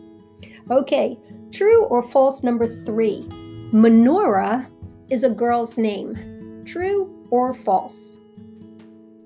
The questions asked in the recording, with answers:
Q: Menorah is a girl's name.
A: Did you say true? Well, if you did, you are correct.